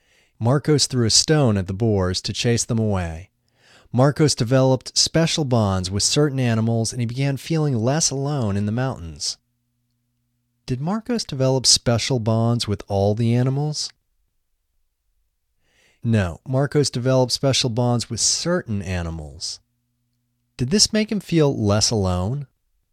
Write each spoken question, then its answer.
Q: Did this make him feel less alone?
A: Yes, this made him feel less alone.